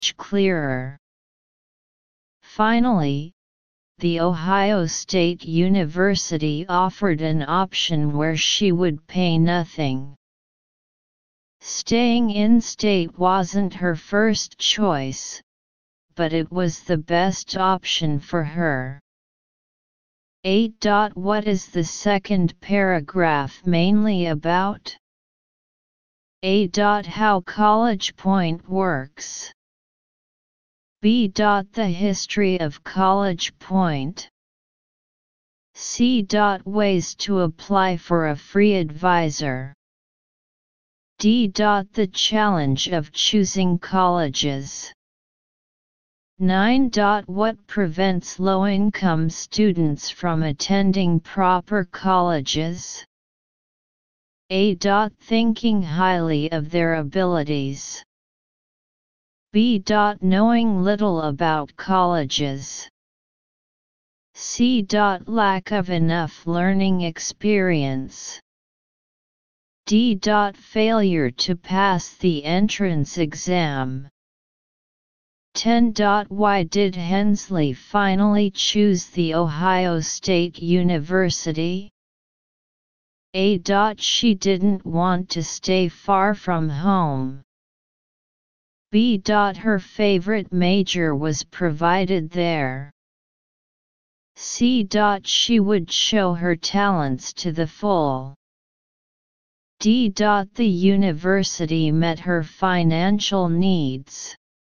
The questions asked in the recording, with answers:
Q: Why did Hensley finally choose the Ohio State University?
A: 10. D.